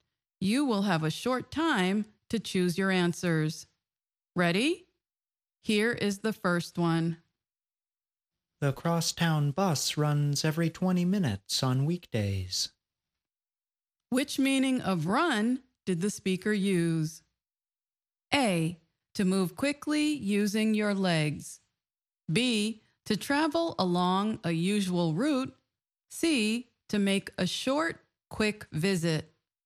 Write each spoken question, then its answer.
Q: Which meaning of run did the speaker use?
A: The answer is B, to travel along a usual route.